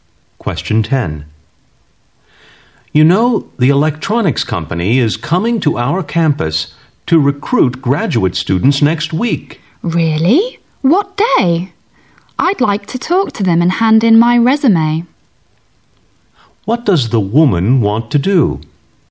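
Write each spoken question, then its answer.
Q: What does the woman want to do?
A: Talk to the company's recruiters and hand in her resume.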